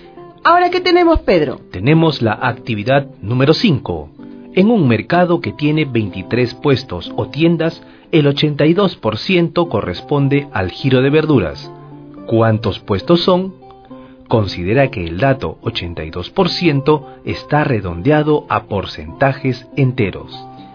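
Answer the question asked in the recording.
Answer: 19 puestos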